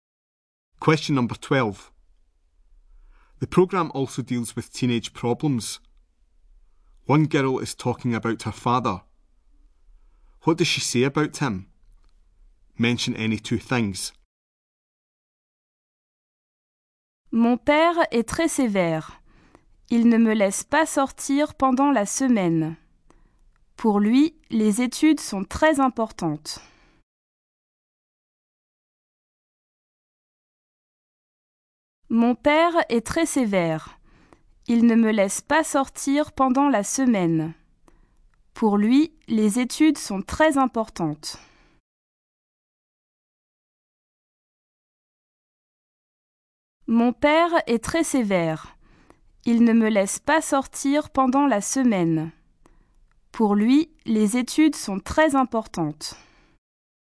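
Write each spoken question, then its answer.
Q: What does she say about him?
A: He is very strict; doesn't let her go out during the week; studies are very important to him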